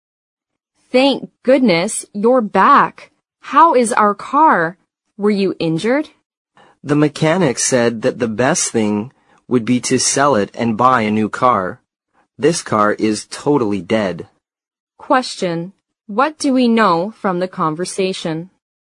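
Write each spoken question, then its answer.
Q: What do we know from the conversation?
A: The car is totally dead; the mechanic advised selling it and buying a new one.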